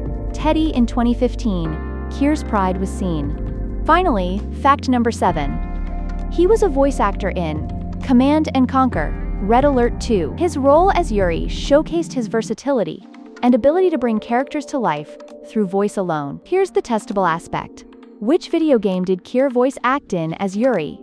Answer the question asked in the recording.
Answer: Correct answer, Command & Conquer, Red Alert 2